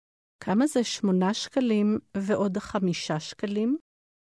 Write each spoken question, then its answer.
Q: כמה זה 8 שקלים ועוד 5 שקלים?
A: 13 שקלים.